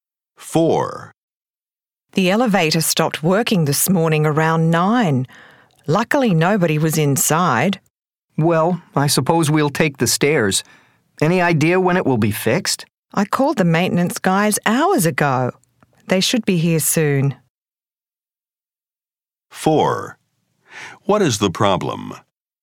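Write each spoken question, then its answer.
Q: What is the problem?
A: The elevator is not working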